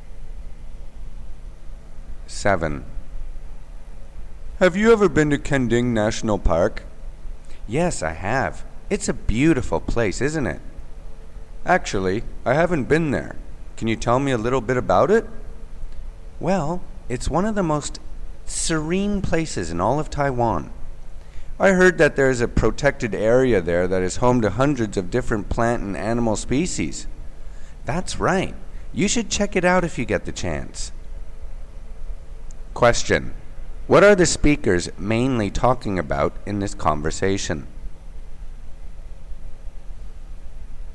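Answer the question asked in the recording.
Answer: Kenting National Park in Taiwan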